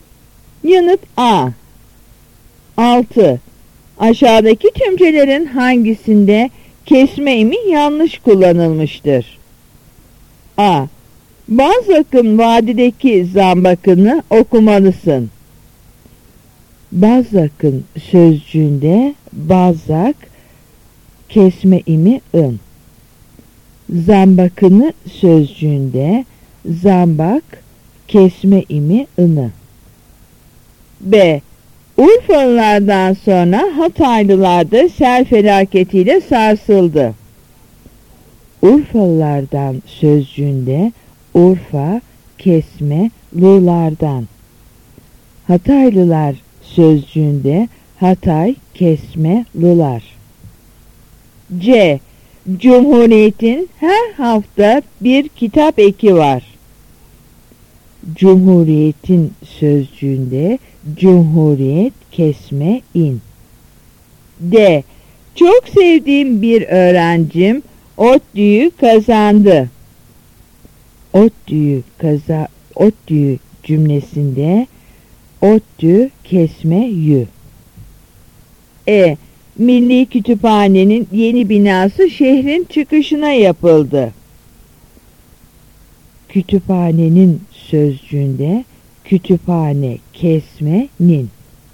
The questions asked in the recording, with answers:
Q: Aşağıdaki tümcelerin hangisinde kesme imi yanlış kullanılmıştır?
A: Yanıt B.